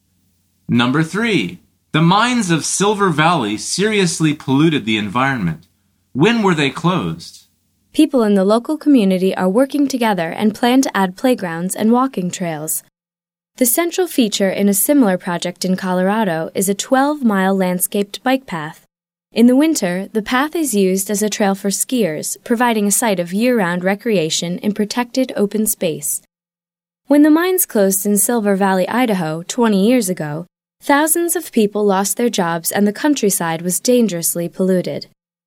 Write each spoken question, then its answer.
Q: When were they closed?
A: The answer is 20 years ago.